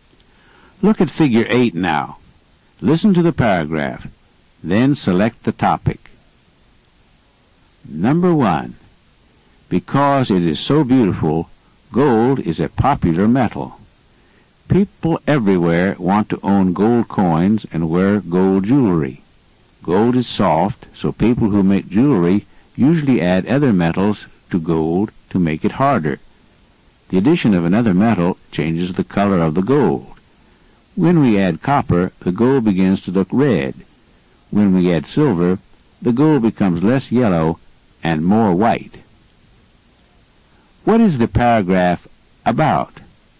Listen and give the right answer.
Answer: The answer is A. Gold was the topic of the paragraph.